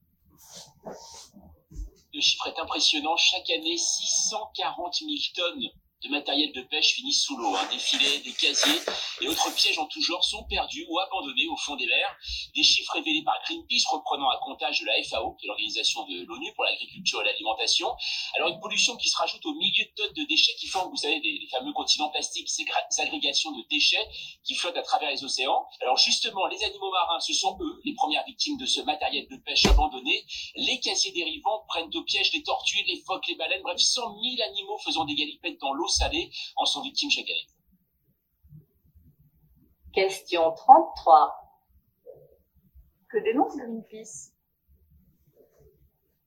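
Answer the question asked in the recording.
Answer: Les 640 000 tonnes de matériel de pêche perdu ou abandonné chaque année au fond des mers, qui tue des animaux marins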